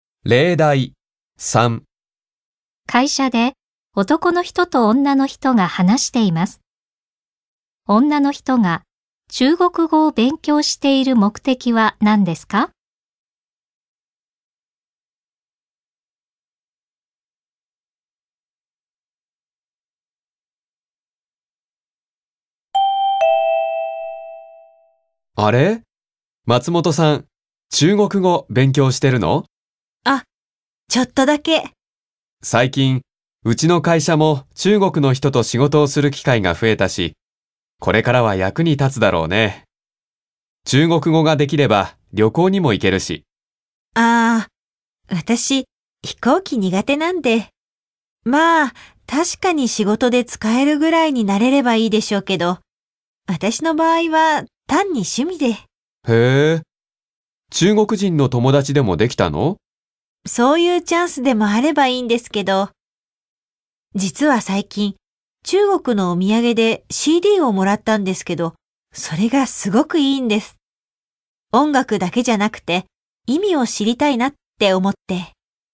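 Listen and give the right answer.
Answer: 中国の音楽(CD)の歌の意味を知りたいから(趣味)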